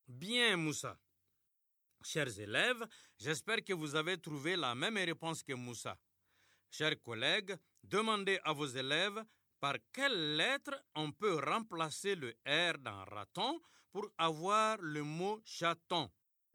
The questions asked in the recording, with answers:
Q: Chers collègues, demandez à vos élèves par quelle lettre on peut remplacer le R dans raton pour avoir le mot chaton.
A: Dans raton, on remplace R par ch pour avoir chaton.